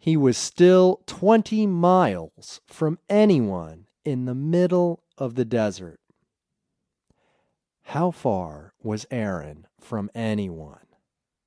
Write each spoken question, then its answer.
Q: How far was Aaron from anyone?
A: He was 20 miles from anyone.